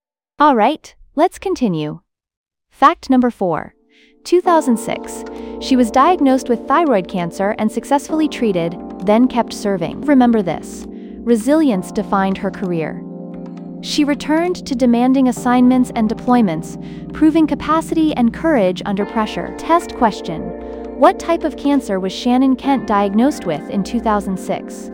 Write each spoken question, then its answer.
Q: What type of cancer was Shannon Kent diagnosed with in 2006?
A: Thyroid cancer.